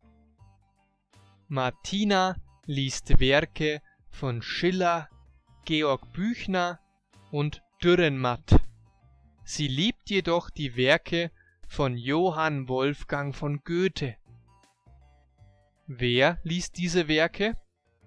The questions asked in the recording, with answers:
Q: Wer liest diese Werke?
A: Martina. Sie liest Werke von Schiller, Büchner und Dürrenmatt.